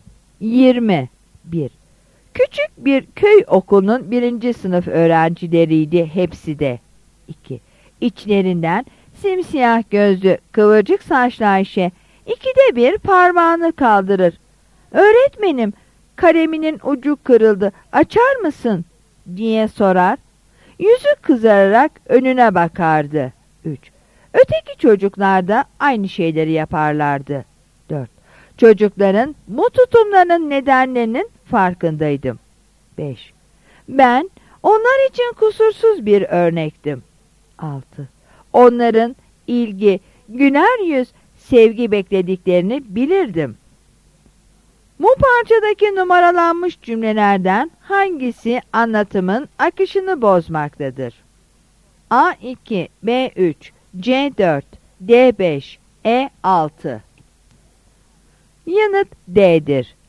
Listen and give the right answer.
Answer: Yanıt D'dir.